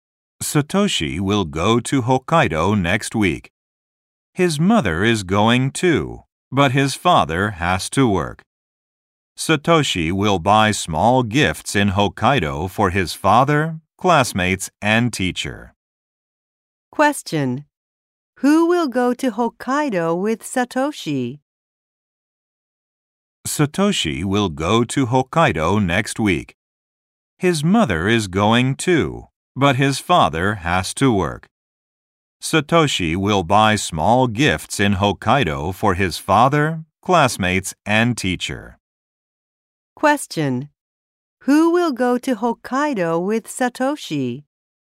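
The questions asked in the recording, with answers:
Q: Who will go to Hokkaido with Satoshi?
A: His mother.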